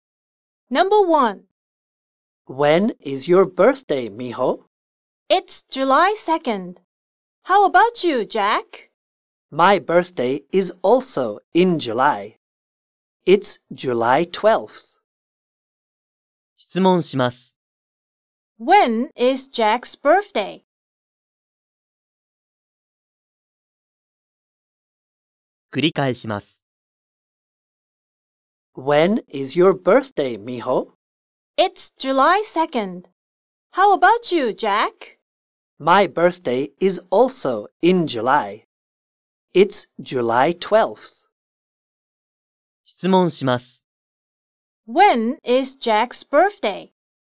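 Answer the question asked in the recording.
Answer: July 12th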